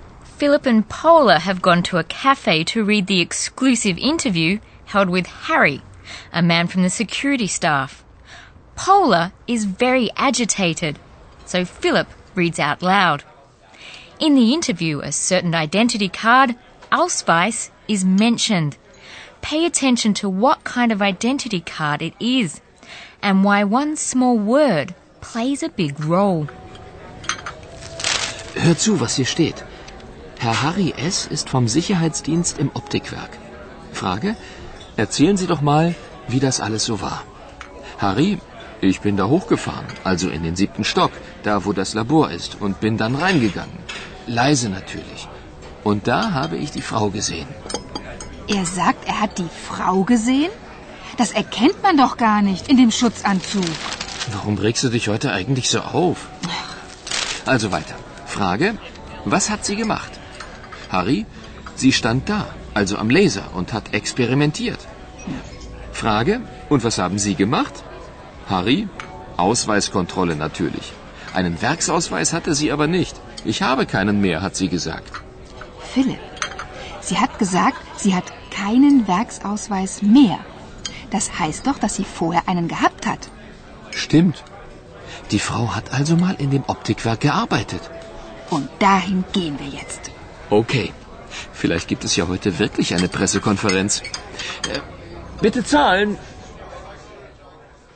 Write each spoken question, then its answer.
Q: Pay attention to what kind of identity card it is and why one small word plays a big role.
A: It means that the woman must once have had a factory identity card, and thus that she used to work in the optics factory.